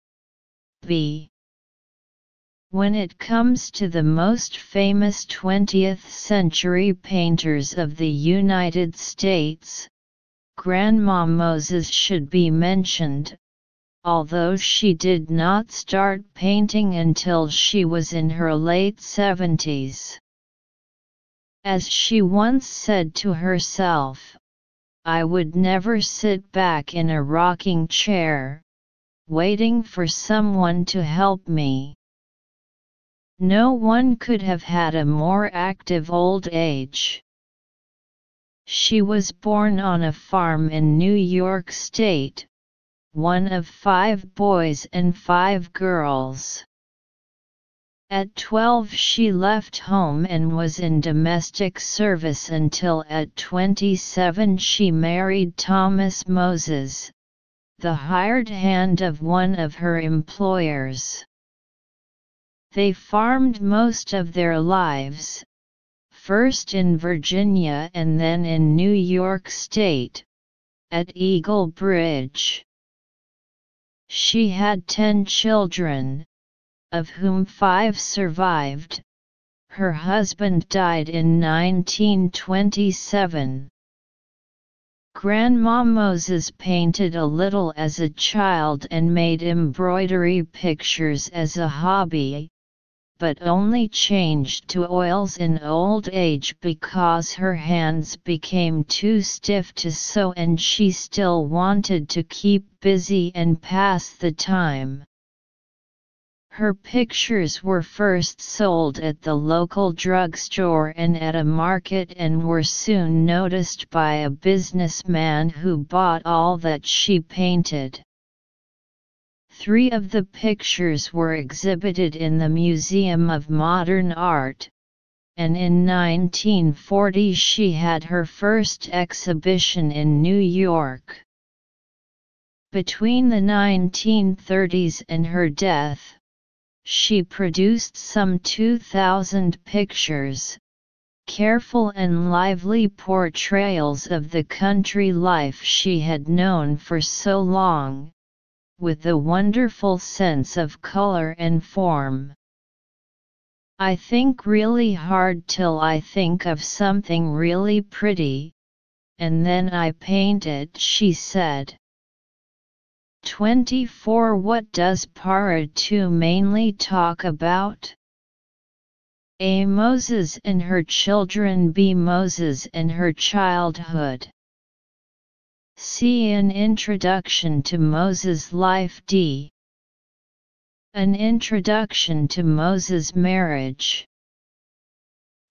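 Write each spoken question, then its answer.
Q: What does Para 2 mainly talk about?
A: C: An introduction to Moses' life.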